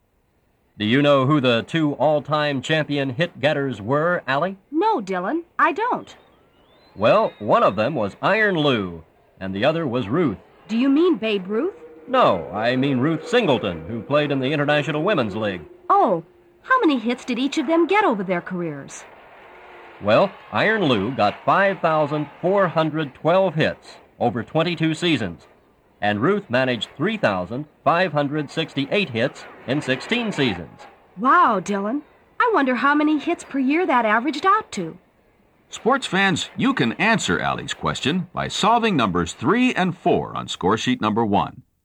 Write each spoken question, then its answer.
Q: Wow, Dylan. I wonder how many hits per year that averaged out to.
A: You should have found that Iron Lou averaged 246 hits per year.

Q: Wow, Dylan. I wonder how many hits per year that averaged out to.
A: Then you should have found that Ruth averaged 223 hits per year.